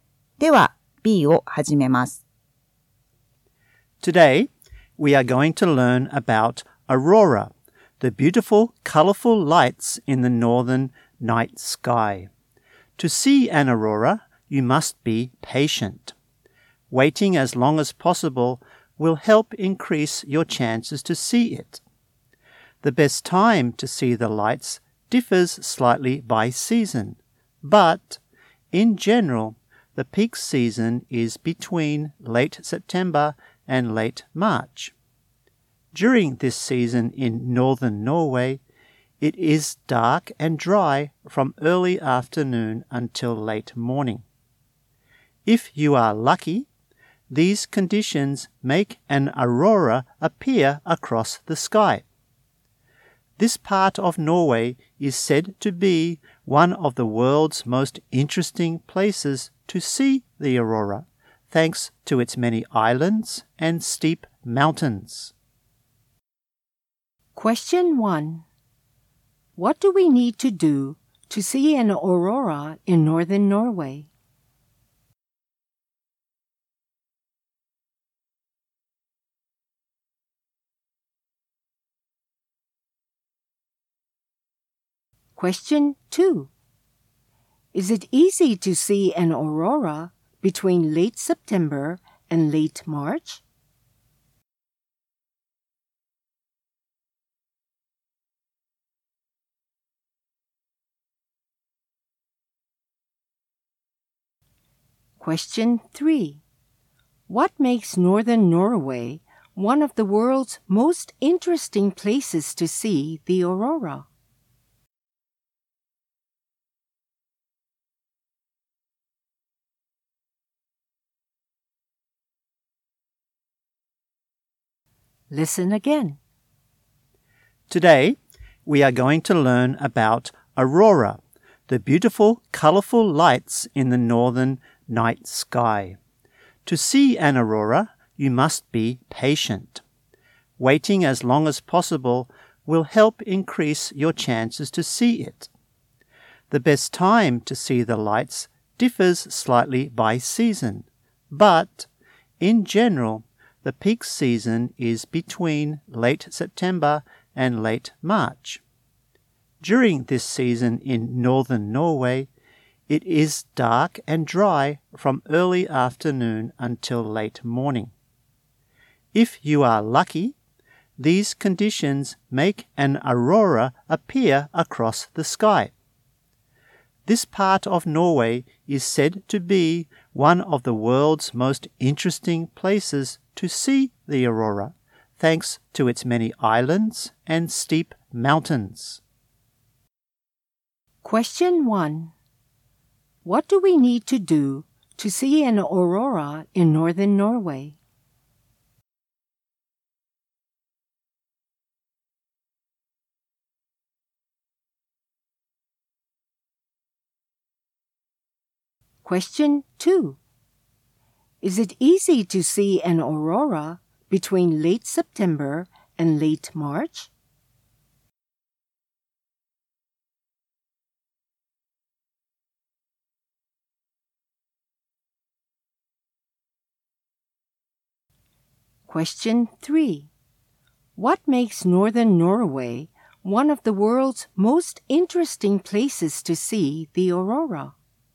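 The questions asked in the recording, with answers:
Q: What do we need to do to see an aurora in northern Norway?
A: Be patient and wait as long as possible.

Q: What makes northern Norway one of the world's most interesting places to see the aurora?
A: Its many islands and steep mountains.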